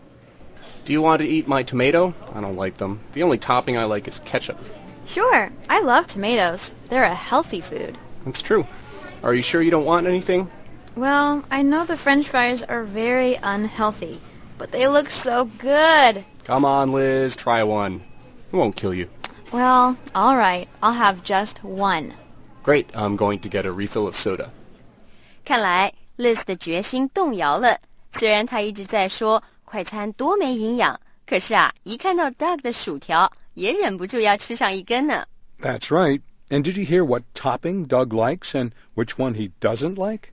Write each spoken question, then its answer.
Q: And did you hear what topping Doug likes and which one he doesn't like?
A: Doug 说在汉堡的所有佐料里啊,他只喜欢 ketchup, 番茄酱,还说他不爱吃番茄。